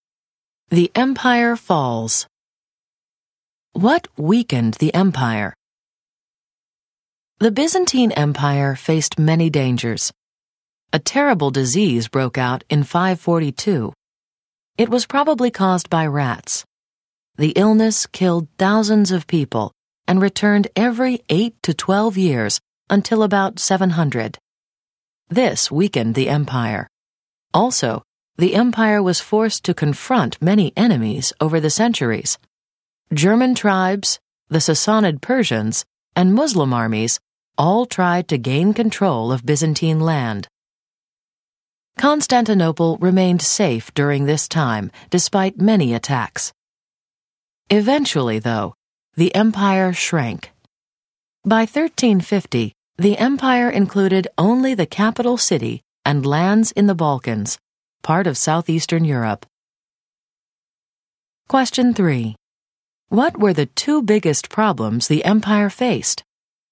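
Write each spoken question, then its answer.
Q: What were the two biggest problems the empire faced?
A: A terrible disease and attacks by many enemies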